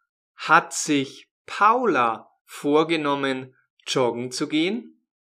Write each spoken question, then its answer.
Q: Hat sich Paula vorgenommen, joggen zu gehen?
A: Nein, nicht Paula hat sich das vorgenommen, sondern Tom.